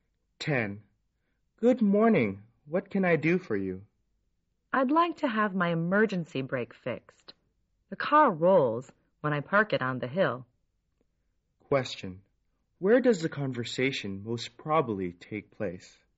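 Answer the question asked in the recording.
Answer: At a car repair shop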